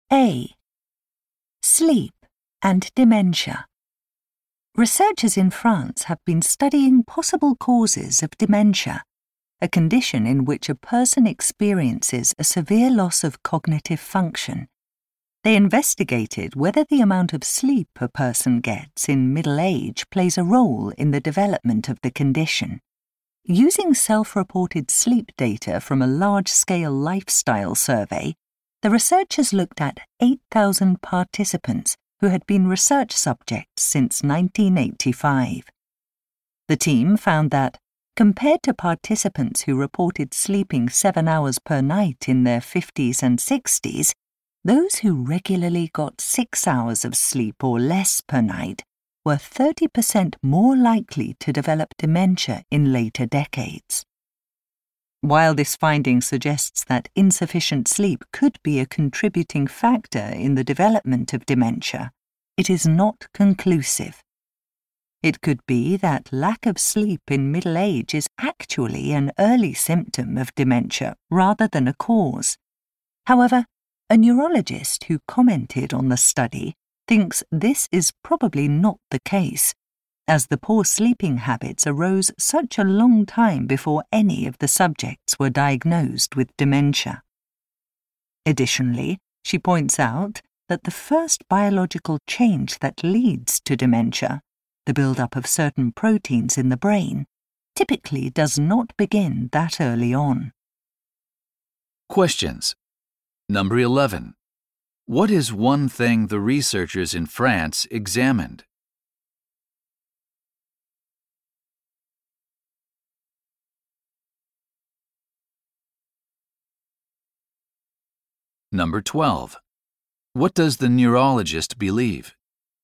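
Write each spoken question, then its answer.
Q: What is one thing the researchers in France examined?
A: Whether the amount of sleep a person gets in middle age affects the development of dementia

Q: What does the neurologist believe?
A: Lack of sleep in middle age is probably a cause of dementia, not an early symptom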